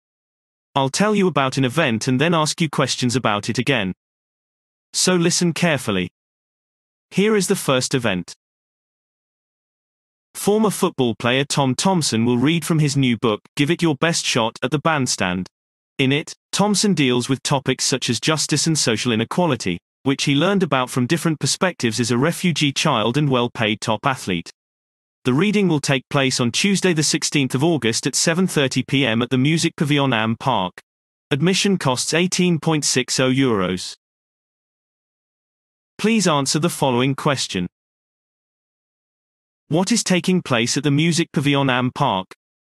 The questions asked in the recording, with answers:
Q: What is taking place at the Music Pavilion Am Park?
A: Former football player Tom Thompson will read from his new book, Give It Your Best Shot, at the bandstand, addressing issues of justice and social inequality.